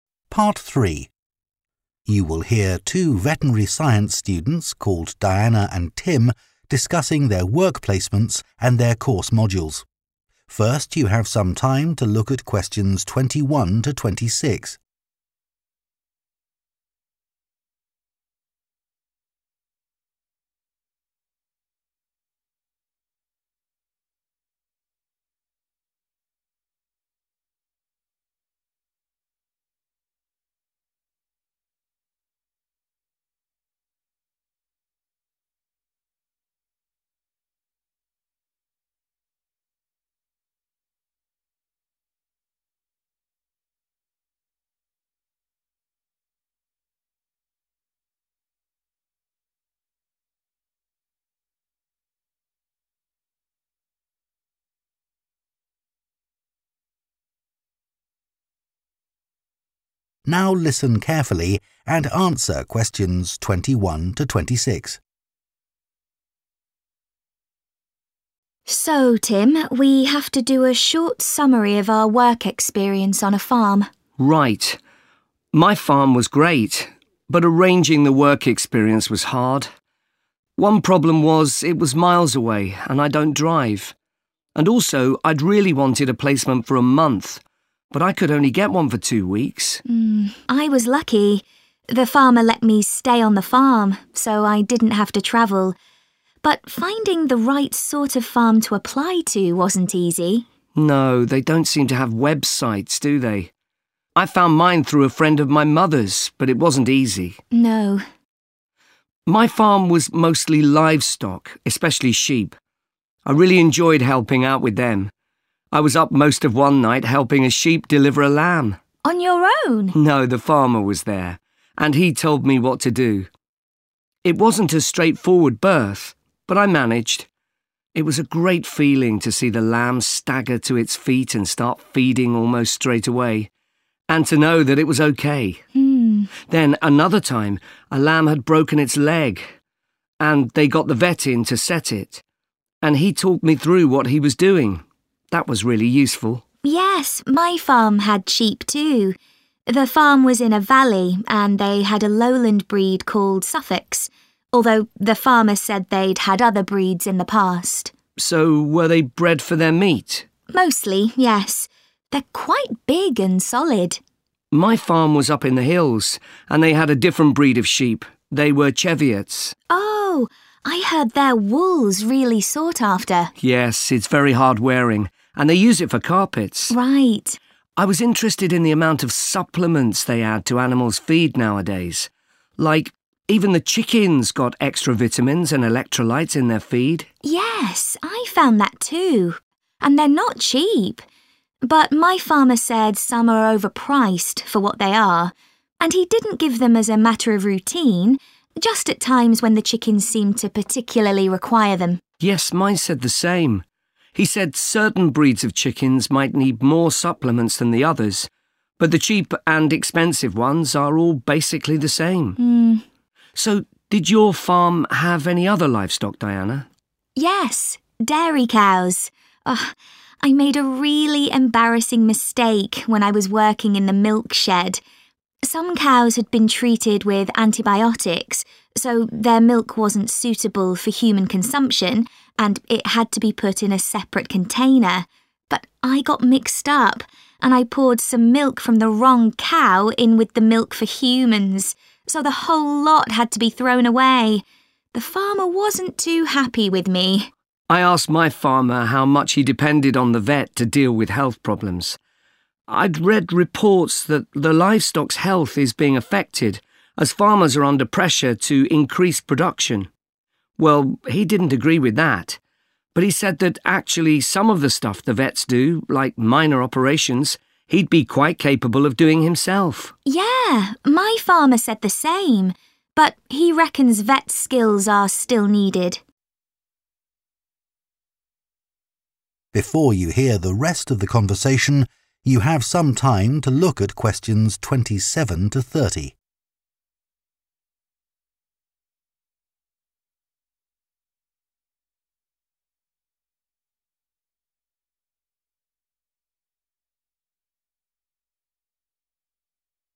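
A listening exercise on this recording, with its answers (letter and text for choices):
Choose the correct letter, A, B or c.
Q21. What problem did both Diana and Tim have when arranging their work experience?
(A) making initial contact with suitable farms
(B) organising transport to and from the farm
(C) finding a placement for the required length of time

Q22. Tim was pleased to be able to help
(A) a lamb that had a broken leg.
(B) a sheep that was having difficulty giving birth.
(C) a newly born lamb that was having trouble feeding.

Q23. Diana says the sheep on her farm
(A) were of various different varieties.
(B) were mainly reared for their meat.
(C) had better quality wool than sheep on the hills.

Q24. What did the students learn about adding supplements to chicken feed?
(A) These should only be given if specially needed.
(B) It is worth paying extra for the most effective ones.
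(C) The amount given at one time should be limited.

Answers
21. (A) making initial contact with suitable farms
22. (B) a sheep that was having difficulty giving birth.
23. (B) were mainly reared for their meat.
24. (A) These should only be given if specially needed.

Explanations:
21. TIM: No, they don't seem to have websites, do they. I found mine through a friend of my mother's, but it wasn't easy [việc này không hề dễ dàng → Cả Tim và Diana đều gặp khó khăn → Chọn đáp án A]
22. I was up most of one night helping a sheep deliver a lamb [Tôi đã thức gần như suốt đêm để giúp một con cừu đẻ một con cừu non → Chọn đáp án B]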